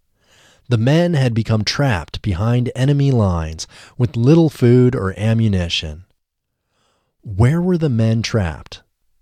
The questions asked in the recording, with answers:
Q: Where were the men trapped?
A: The men were trapped behind enemy lines.